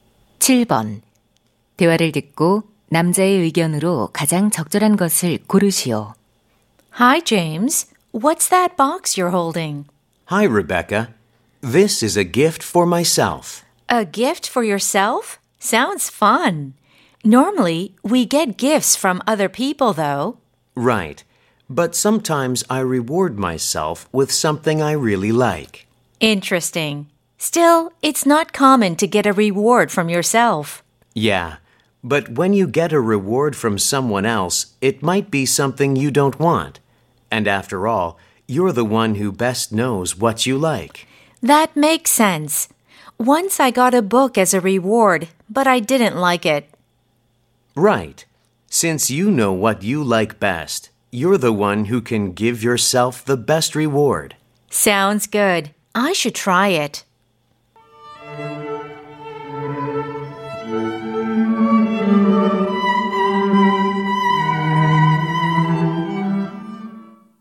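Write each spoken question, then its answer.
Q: 대화를 듣고 남자의 의견으로 가장 적절한 것을 고르시오.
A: 자신이 좋아하는 것을 가장 잘 알기에 스스로에게 최고의 보상을 줄 수 있다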